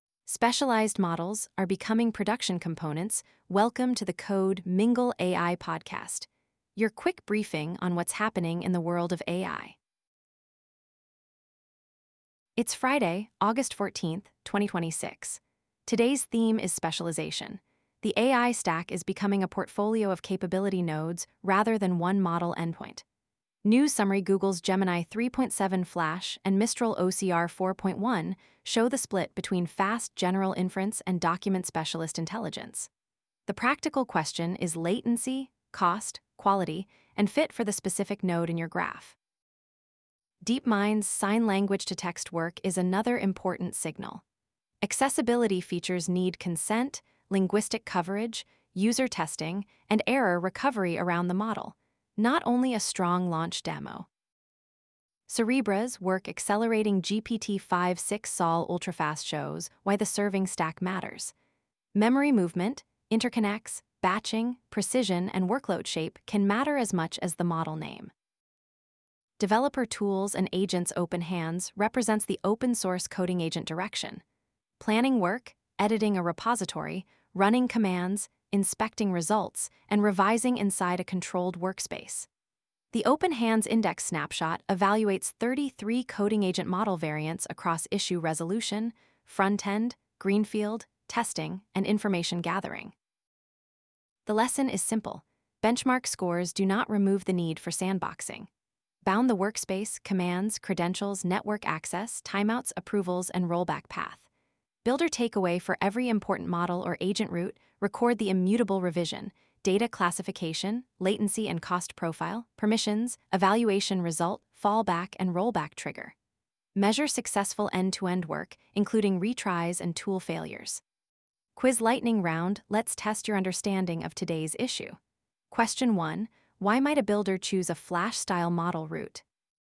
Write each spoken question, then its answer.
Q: why might a builder choose a flash-style model route?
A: Answer B. It can provide lower latency or cost for high-volume interactive work.